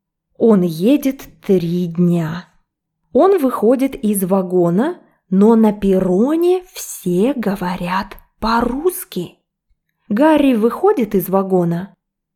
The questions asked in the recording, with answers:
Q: Гарри выходит из вагона?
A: Да, он выходит из вагона.